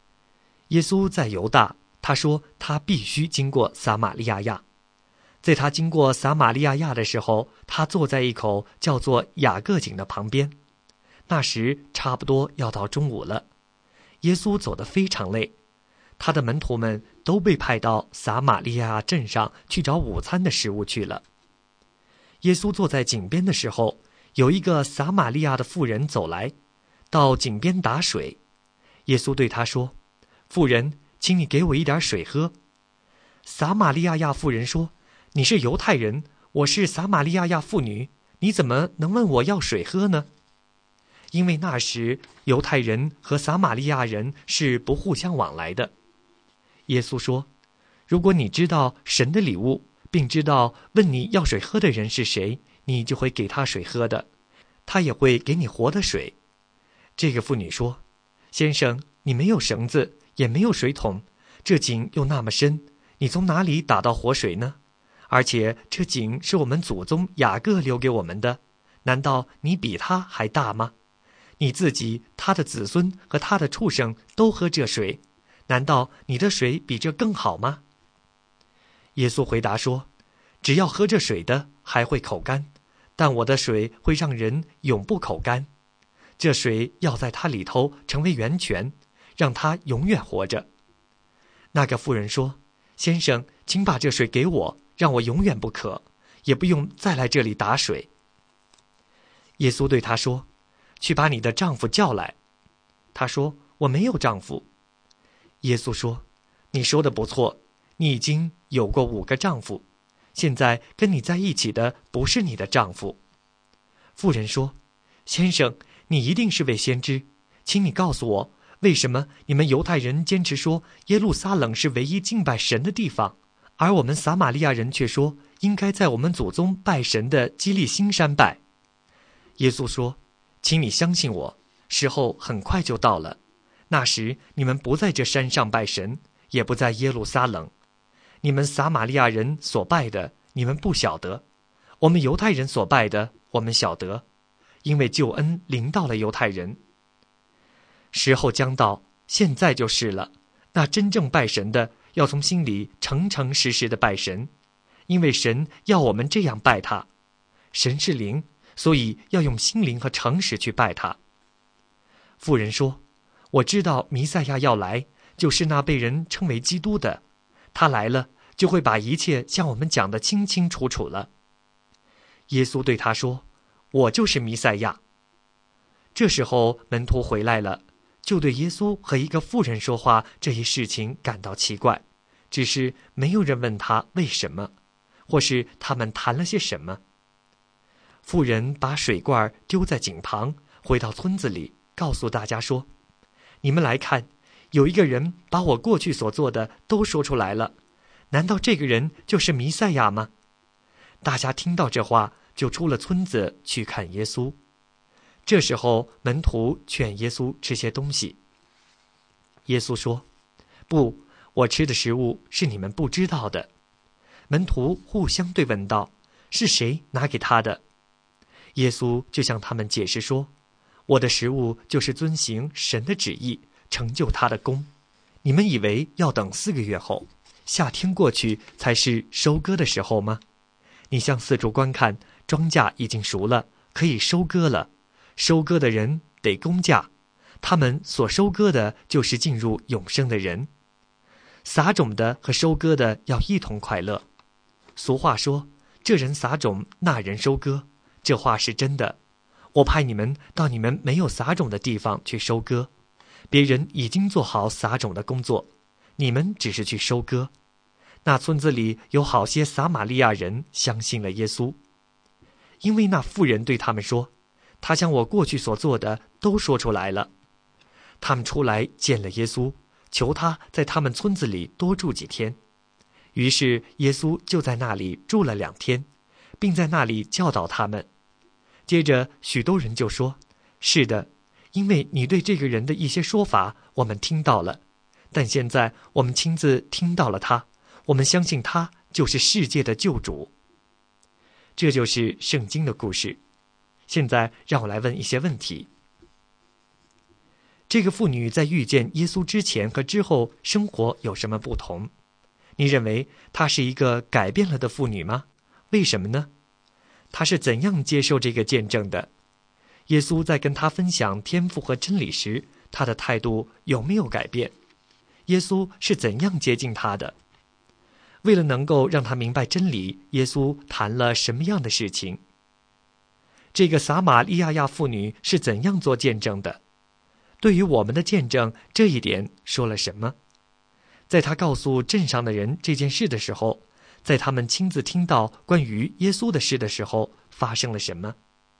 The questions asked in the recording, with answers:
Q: 这个撒玛利亚亚妇女是怎样做见证的?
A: 他说耶稣知道他的一切事情,但他却不知道耶稣的每一件事,但是他告诉了他们他所知道的一切。

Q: 在他告诉镇上的人这件事的时候,在他们亲自听到关于耶稣的事的时候,发生了什么?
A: 接着那使他们带到了耶稣面前,这样他们就可以听故事了。